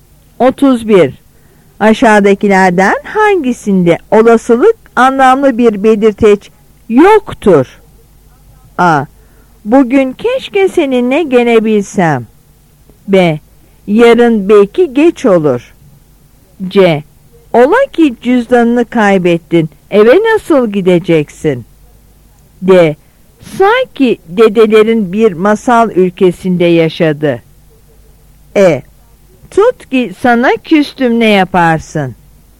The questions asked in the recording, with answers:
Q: Aşağıdakilerden hangisinde olasılık anlamlı bir belirteç yoktur?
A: Yanıt A.